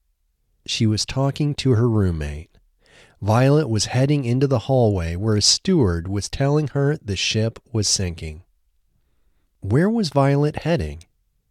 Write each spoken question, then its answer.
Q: Where was Violet heading?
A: She was heading into a hallway.